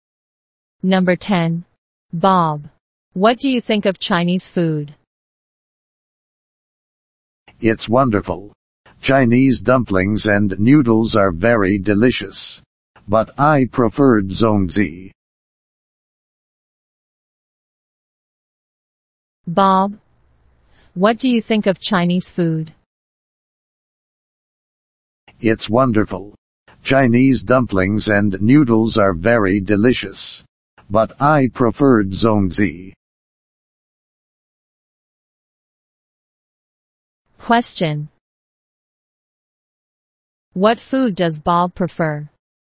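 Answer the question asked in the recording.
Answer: Zongzi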